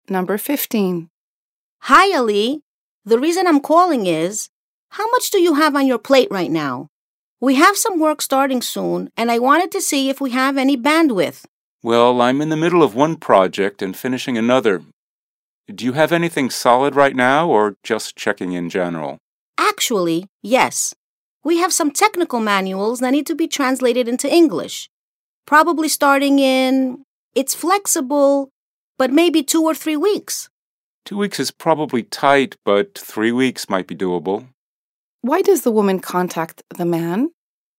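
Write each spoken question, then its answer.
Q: Why does the woman contact the man?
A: To ask whether he has time to take on a new project (translating technical manuals into English)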